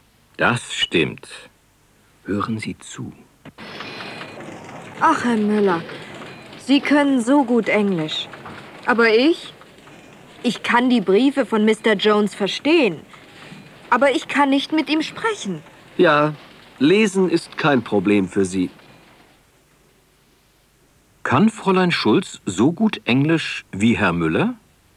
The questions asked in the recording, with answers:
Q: Kann Fräulein Schulz so gut Englisch wie Herr Müller?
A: Nein, sie kann nicht so gut Englisch wie er.